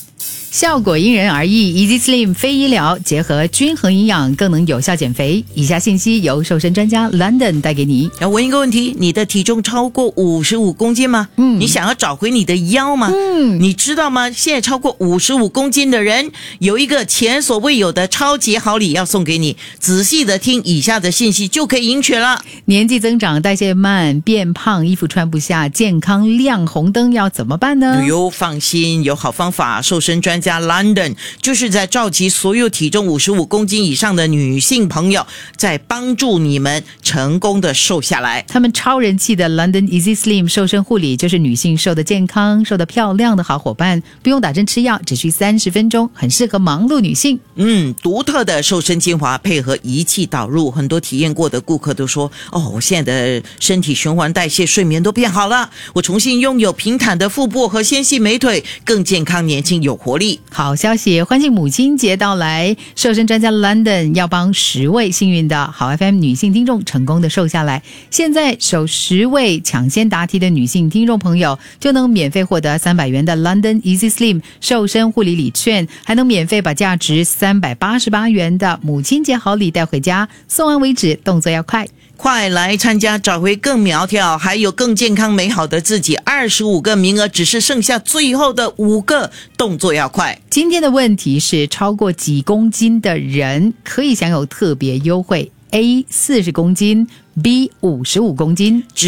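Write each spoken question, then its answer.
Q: 今天的问题是,超过几公斤的人可以享有特别优惠? A 40公斤, B 55公斤。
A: B: 55公斤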